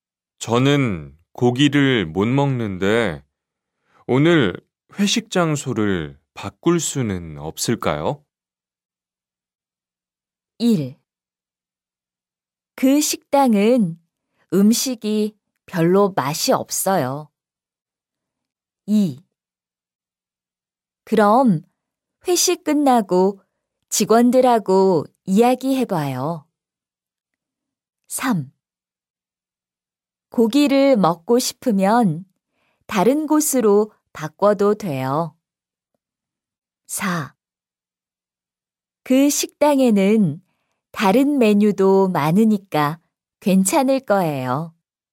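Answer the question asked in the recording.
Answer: 4: 그 식당에는 다른 메뉴도 많으니까 괜찮을 거예요.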